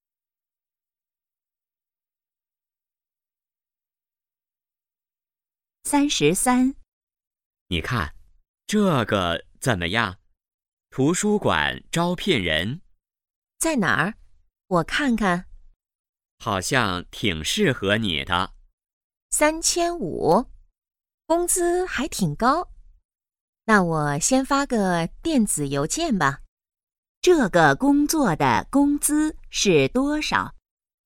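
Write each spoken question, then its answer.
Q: 这个工作的工资是多少?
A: 3500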